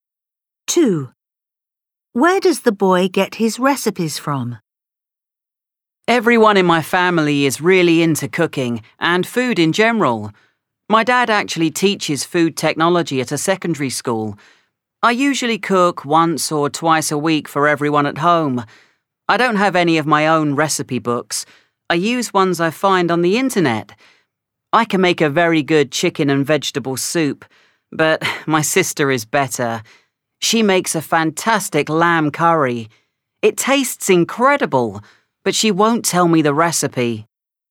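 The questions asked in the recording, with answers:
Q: Where does the boy get his recipes from?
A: the internet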